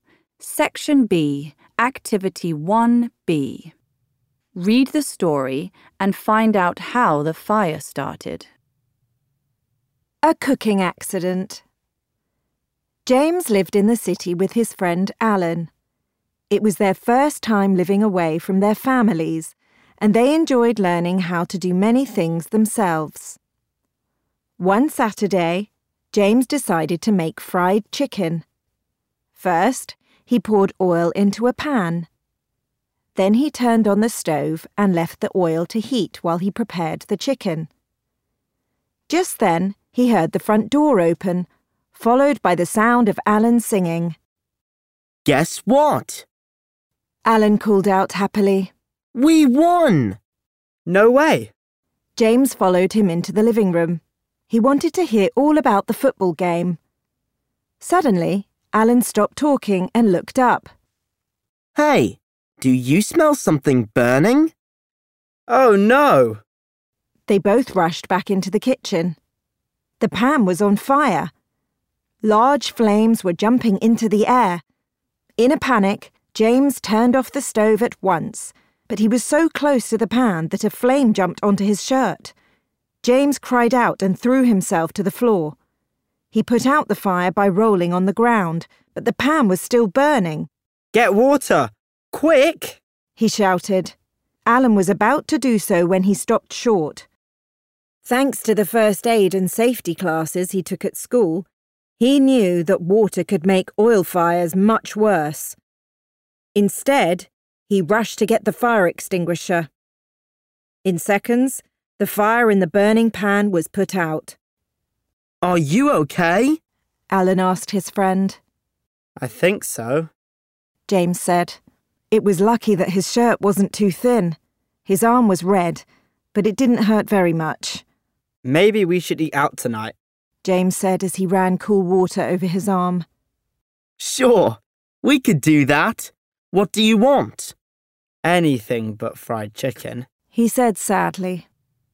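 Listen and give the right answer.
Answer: James left oil heating in a pan on the stove and went off to talk to Alan, so the oil caught fire.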